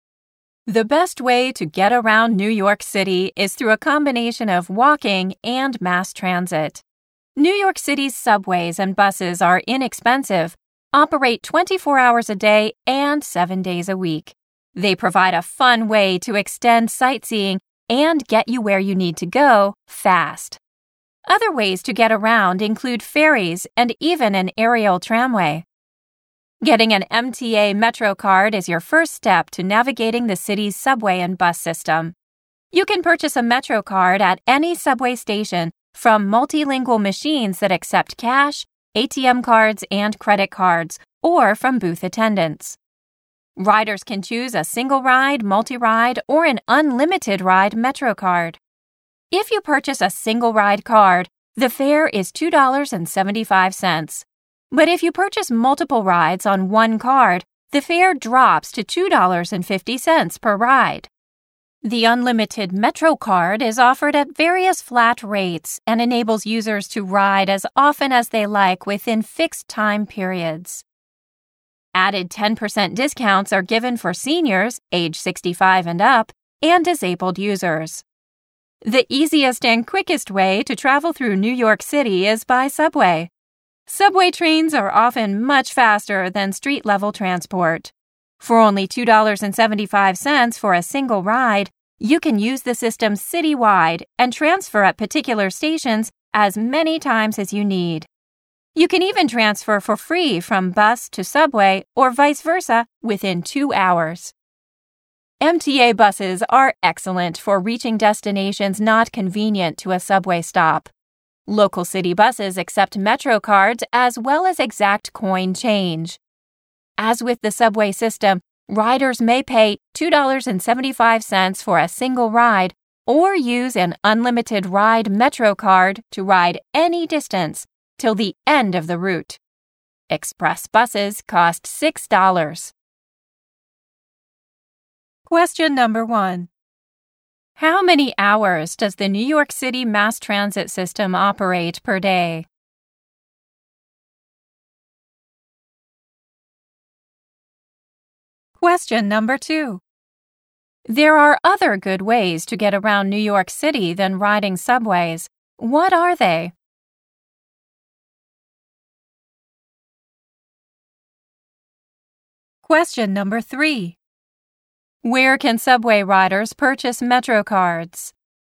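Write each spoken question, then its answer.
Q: How many hours does the New York City mass transit system operate per day?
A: 24 hours a day

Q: Where can subway riders purchase Metro cards?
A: At any subway station, from machines or booth attendants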